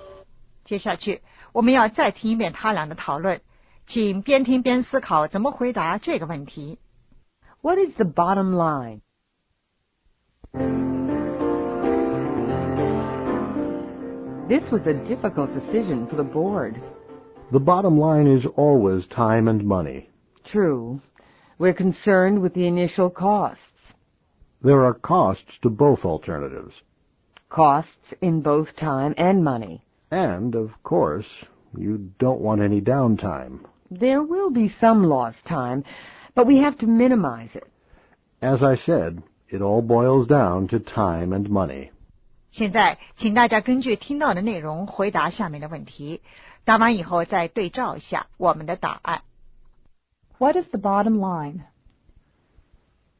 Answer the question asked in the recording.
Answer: Time and money.